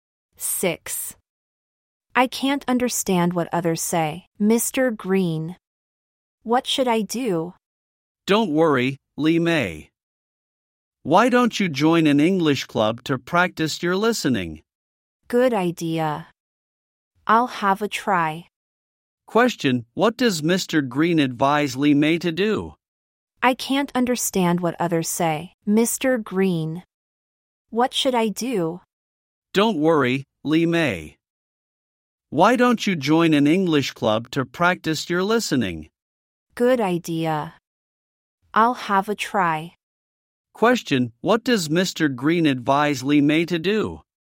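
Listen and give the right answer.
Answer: Join an English club to practice her listening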